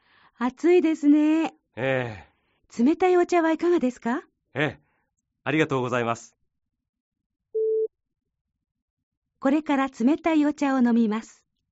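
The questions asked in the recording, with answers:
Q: これから冷たいお茶を飲みます。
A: ○(正しい)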